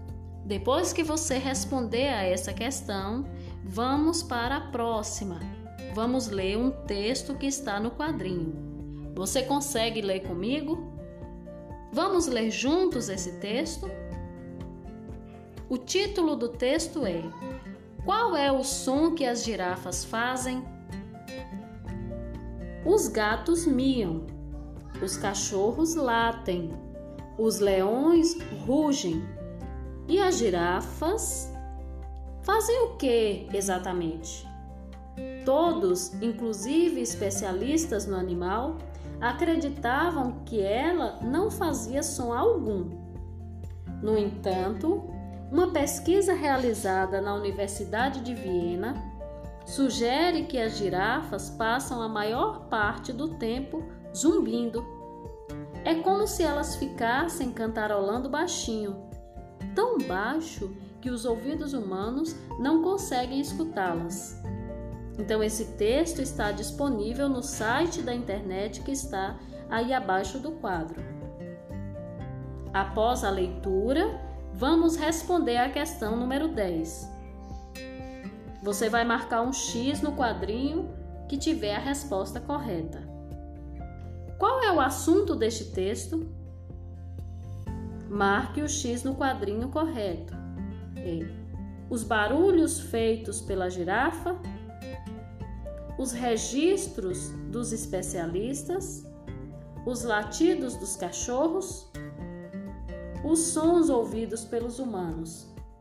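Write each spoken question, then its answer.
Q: Qual é o assunto deste texto?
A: A: os barulhos feitos pela girafa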